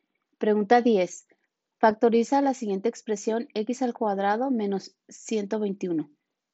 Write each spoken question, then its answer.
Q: Factoriza la siguiente expresión x al cuadrado menos 121.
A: Y la respuesta correcta es la A, x más 11 por x menos 11.